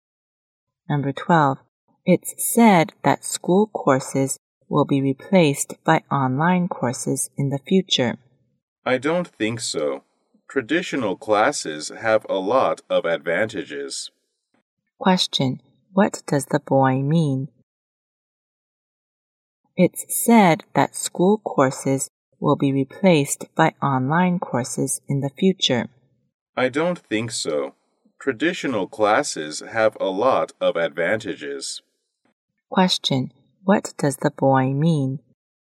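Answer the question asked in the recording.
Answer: Online courses won't replace school courses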